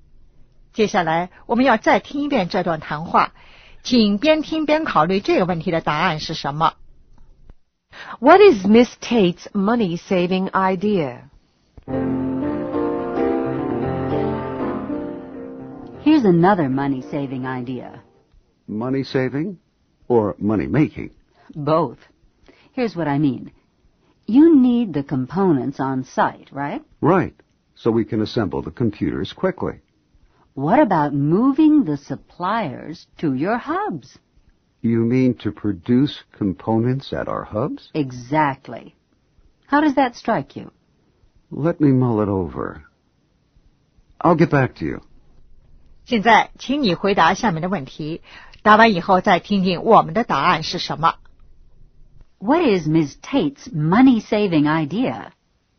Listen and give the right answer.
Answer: To produce components at the hubs.